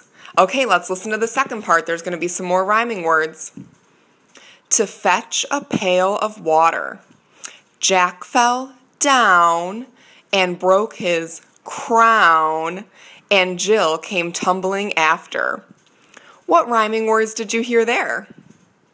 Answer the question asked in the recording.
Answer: If you said down and crown, great job, you're right.